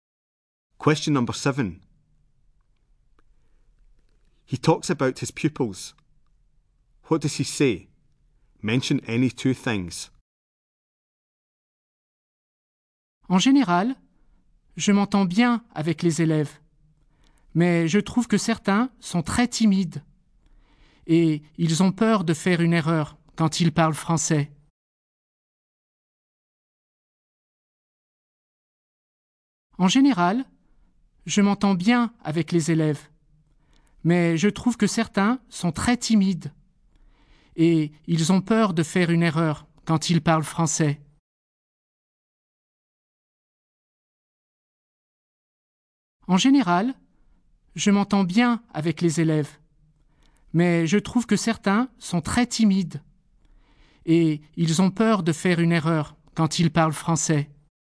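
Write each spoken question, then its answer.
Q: What does he say? Mention any 2 things.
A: He gets on well with pupils; some are very shy; they are afraid of making mistakes speaking French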